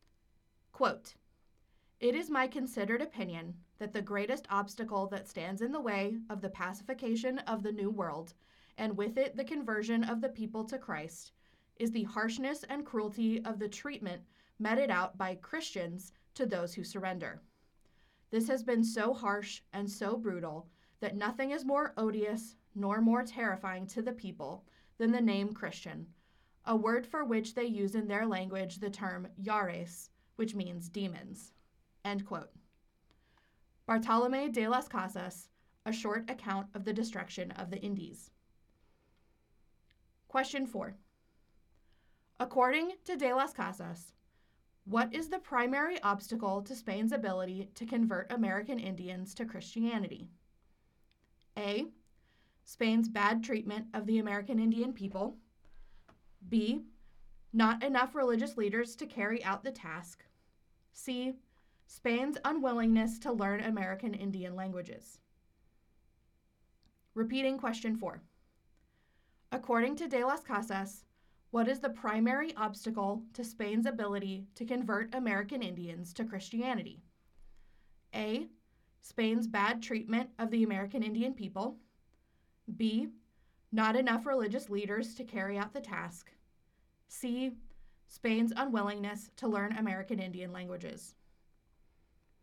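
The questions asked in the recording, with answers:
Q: According to de las Casas, what is the primary obstacle to Spain's ability to convert American Indians to Christianity?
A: A: Spain's bad treatment of the American Indian people.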